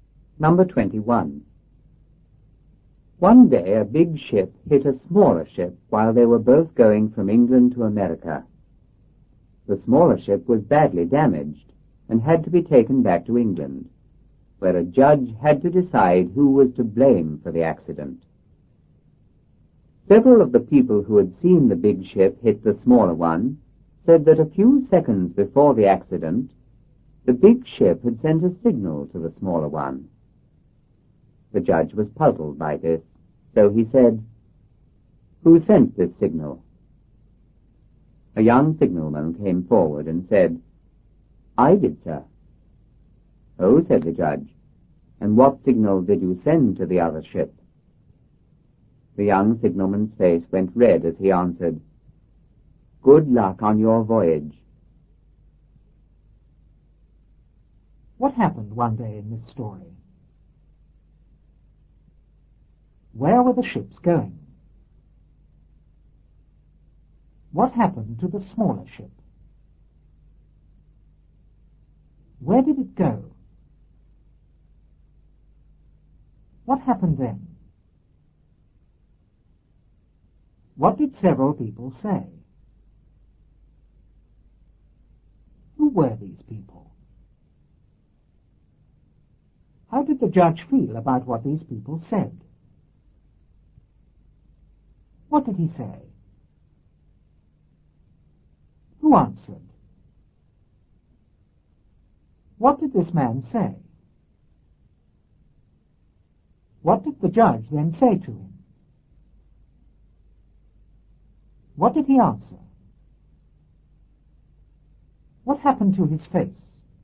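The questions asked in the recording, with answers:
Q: What happened one day in this story?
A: A big ship hit a smaller ship.

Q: Where were the ships going?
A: From England to America.

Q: What happened to the smaller ship?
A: It was badly damaged.

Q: Where did it go?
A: Back to England.

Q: What happened then?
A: A judge had to decide who was to blame for the accident.

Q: What did several people say?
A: That the big ship had sent a signal to the smaller one a few seconds before the accident.

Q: Who were these people?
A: People who had seen the big ship hit the smaller one.

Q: How did the judge feel about what these people said?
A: He was puzzled.

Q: What did he say?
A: "Who sent this signal?"

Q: Who answered?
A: A young signalman.

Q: What did this man say?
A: "I did, sir."

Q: What did the judge then say to him?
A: "What signal did you send to the other ship?"

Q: What did he answer?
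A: "Good luck on your voyage."

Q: What happened to his face?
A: It went red.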